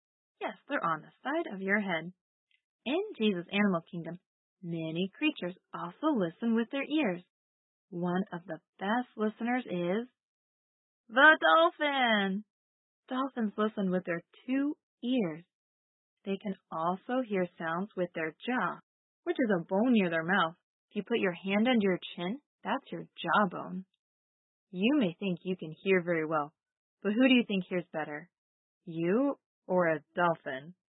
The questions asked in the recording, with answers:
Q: You may think you can hear very well, but who do you think hears better? You or a dolphin?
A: Yes, dolphins can hear much better.